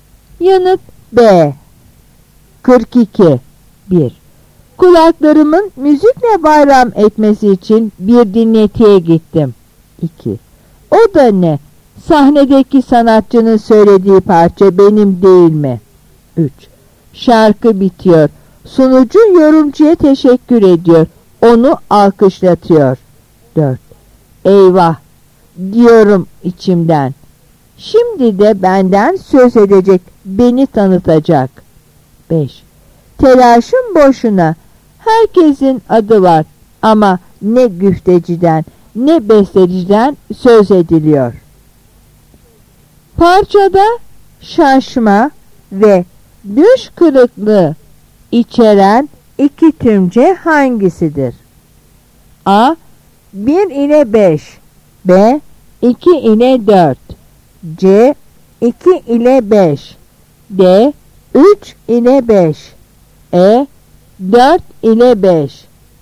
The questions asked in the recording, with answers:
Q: Parçada şaşma ve düş kırıklığı içeren iki tümce hangisidir?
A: Yanıt C.